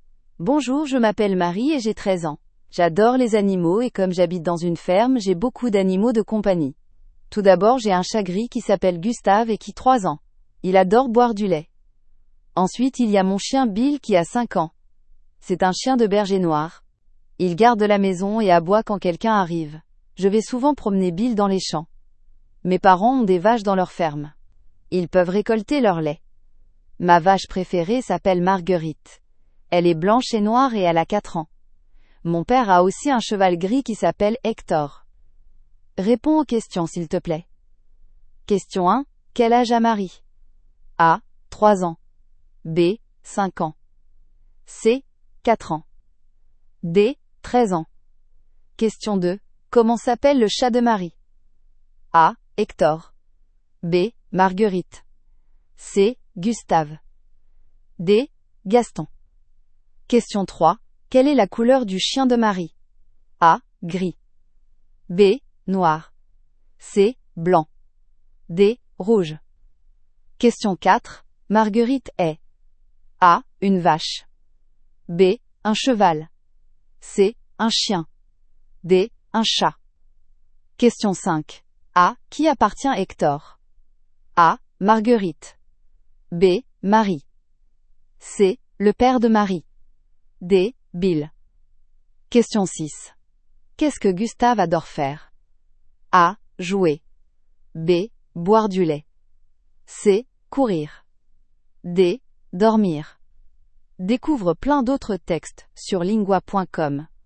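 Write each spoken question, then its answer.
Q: Quel âge a Marie?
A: D: 13 ans

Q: Comment s'appelle le chat de Marie?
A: C: Gustave

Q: Quelle est la couleur du chien de Marie?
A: B: Noir

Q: Marguerite est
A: A: Une vache

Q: A. Qui appartient Hector?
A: C: Le père de Marie

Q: Qu'est-ce que Gustave adore faire?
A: B: Boire du lait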